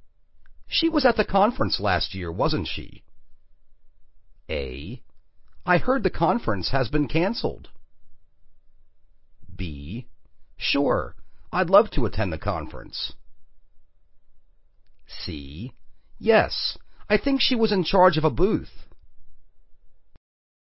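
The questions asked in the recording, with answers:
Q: She was at the conference last year, wasn't she?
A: C: Yes, I think she was in charge of a booth.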